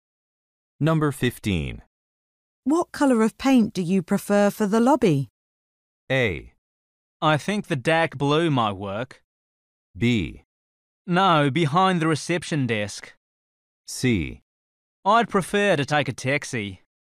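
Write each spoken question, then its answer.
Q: What colour of paint do you prefer for the lobby?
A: A: I think the dark blue might work.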